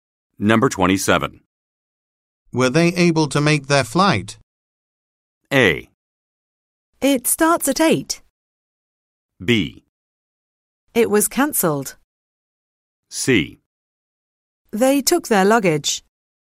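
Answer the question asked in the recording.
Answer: B: It was cancelled.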